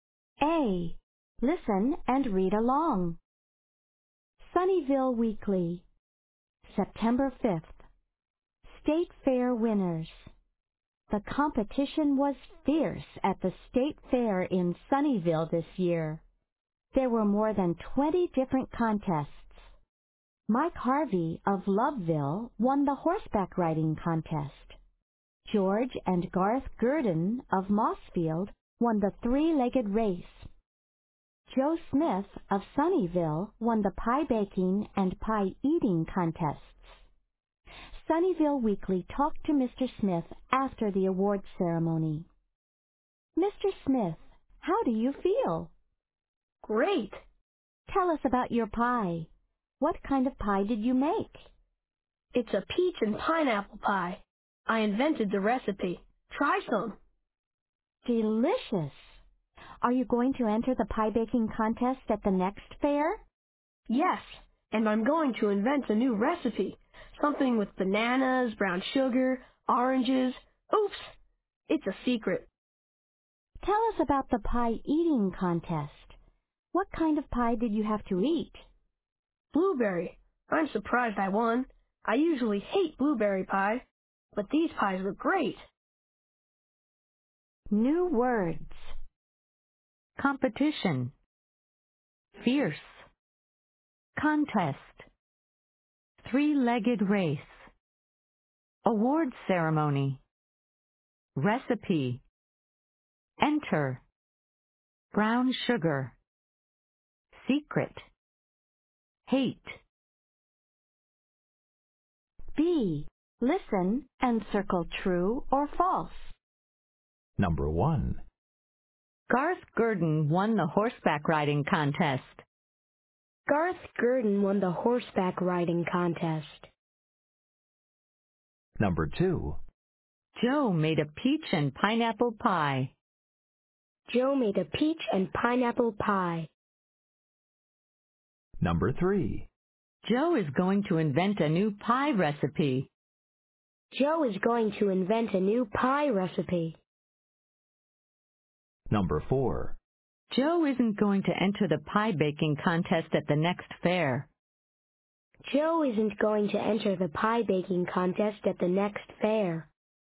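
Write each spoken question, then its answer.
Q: Garth Gurdon won the horseback riding contest.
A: False

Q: Joe made a peach and pineapple pie.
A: True

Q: Joe is going to invent a new pie recipe.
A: True

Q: Joe isn't going to enter the pie baking contest at the next fair.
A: False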